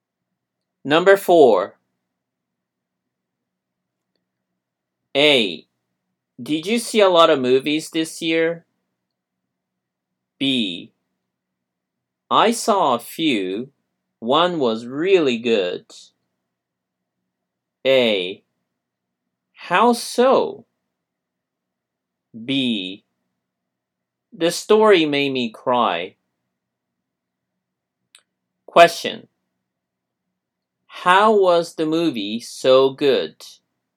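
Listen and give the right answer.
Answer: The story made him cry.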